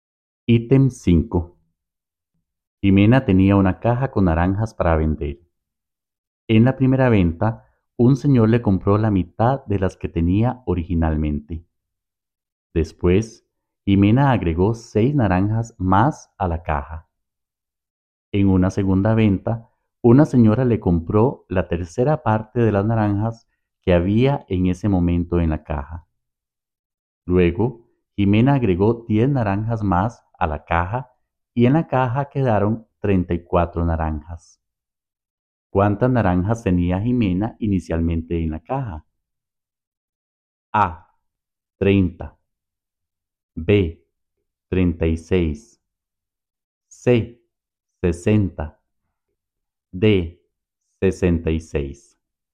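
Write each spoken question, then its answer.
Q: ¿Cuántas naranjas tenía Jimena inicialmente en la caja?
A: C: 60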